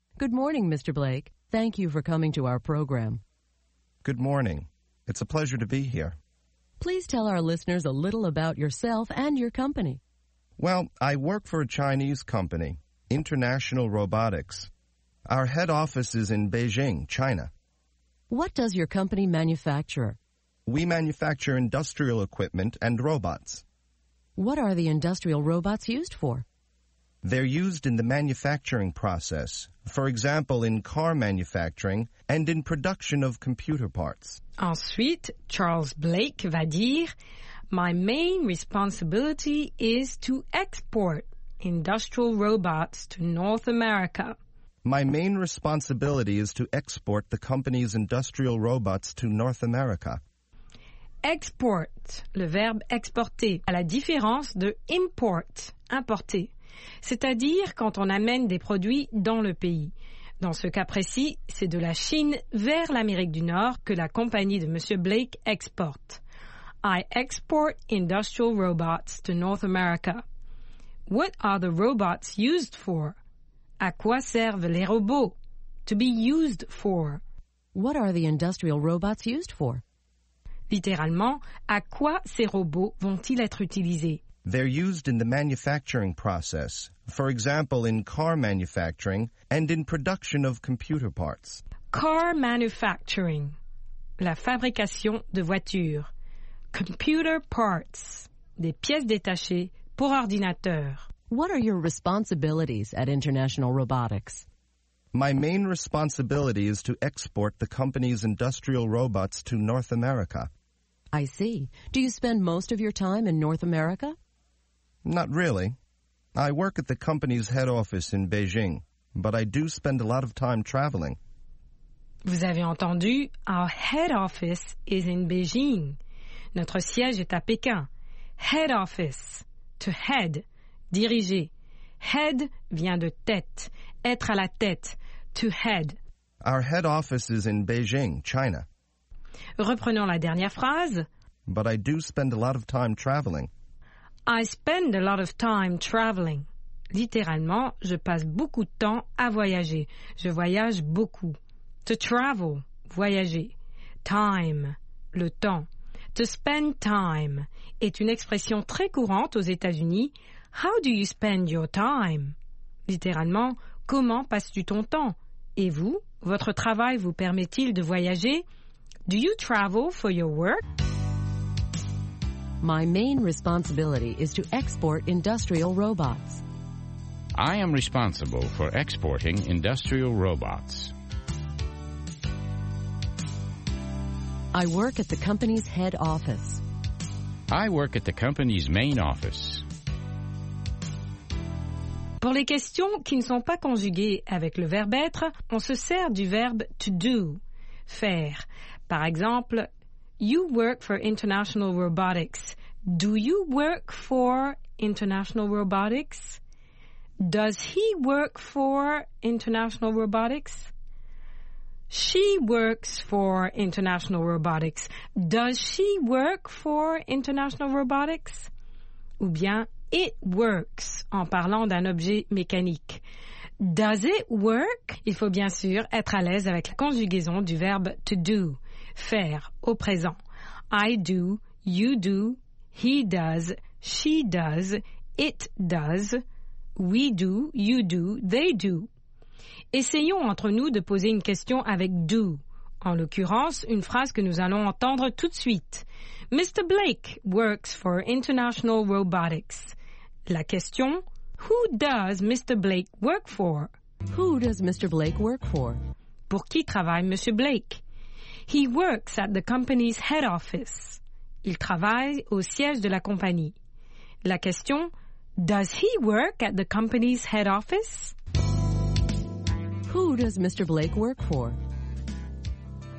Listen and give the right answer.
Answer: He works for International Robotics, a Chinese company.